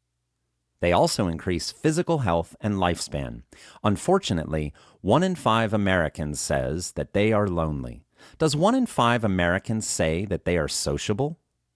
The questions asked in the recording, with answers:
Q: Does 1 in 5 Americans say that they are sociable?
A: No, 1 in 5 Americans does not say that they are sociable.